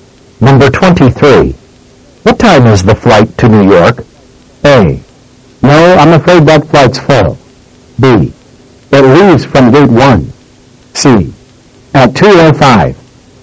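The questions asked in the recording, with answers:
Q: What time is the flight to New York?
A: C: At 2:05.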